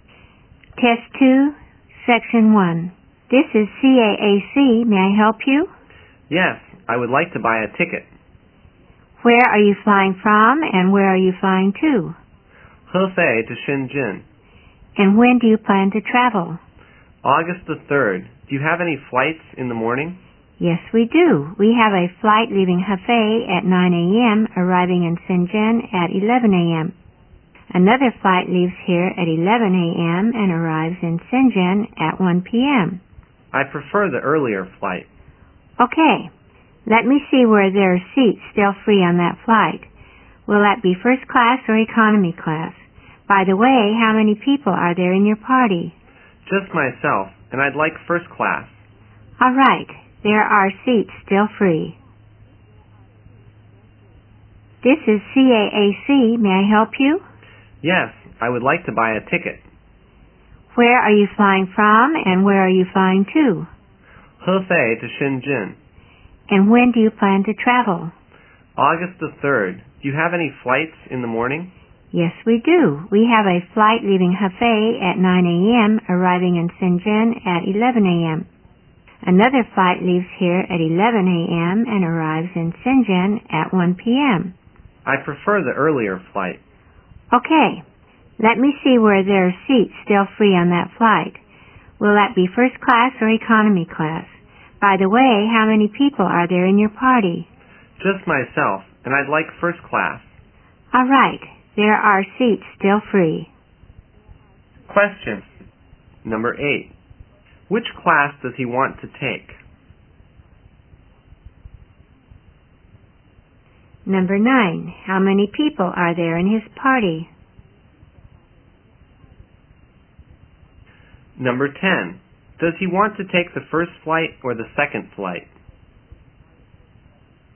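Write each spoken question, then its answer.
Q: Which class does he want to take?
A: First class

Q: How many people are there in his party?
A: Just one, himself

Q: Does he want to take the first flight or the second flight?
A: The first flight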